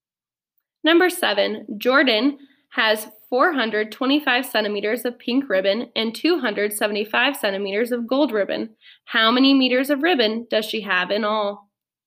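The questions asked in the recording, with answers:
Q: How many meters of ribbon does she have in all?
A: 7 meters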